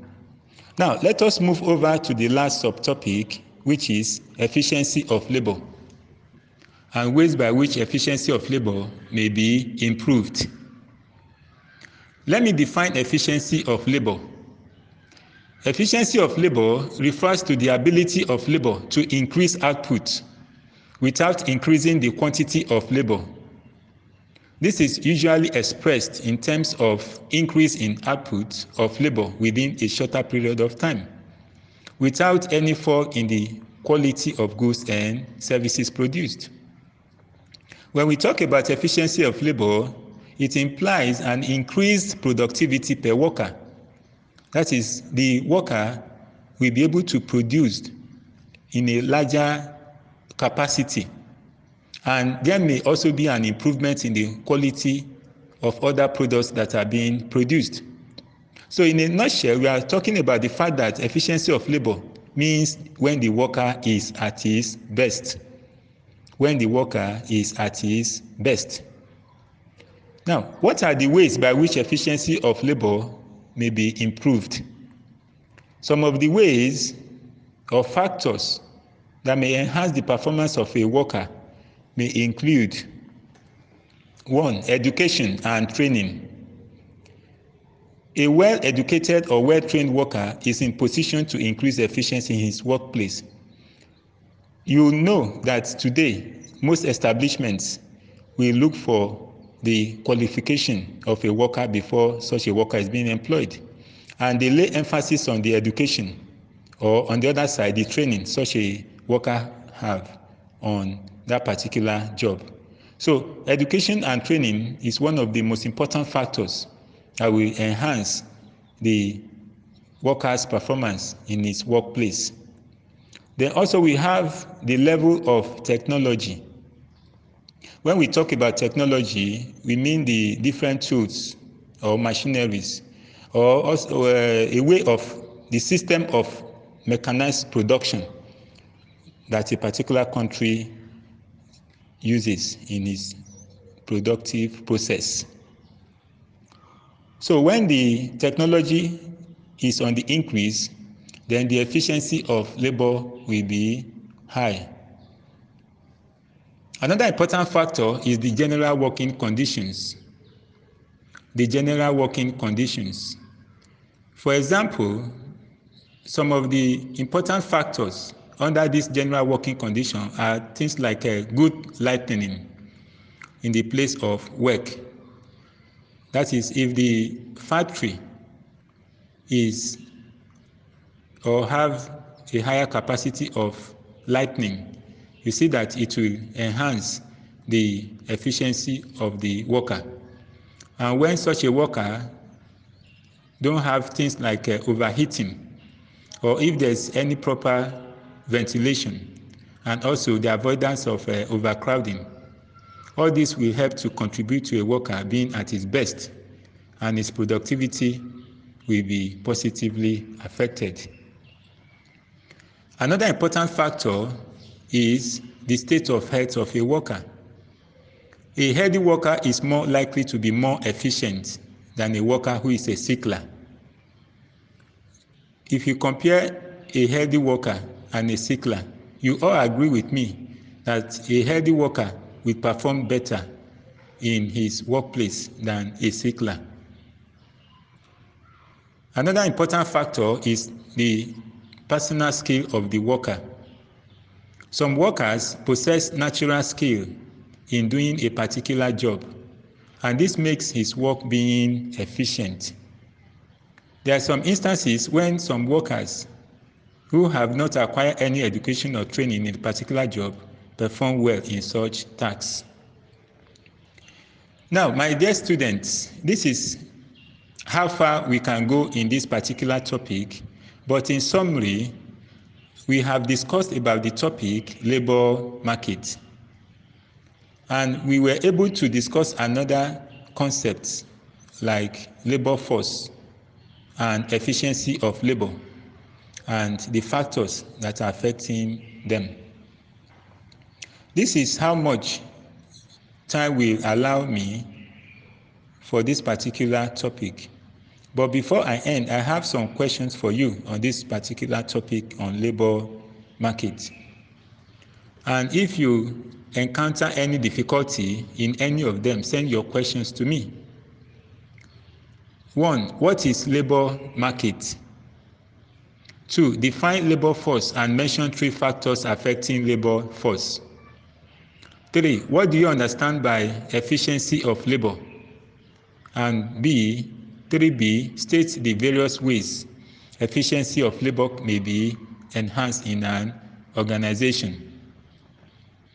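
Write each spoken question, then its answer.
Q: what do you understand by efficiency of labor?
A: The ability of labor to increase output without increasing the quantity of labor, i.e. higher output per worker in a shorter time without a fall in quality

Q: state the various ways efficiency of labor may be enhanced in an organization.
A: Education and training, level of technology, general working conditions, state of health of the worker, personal skill of the worker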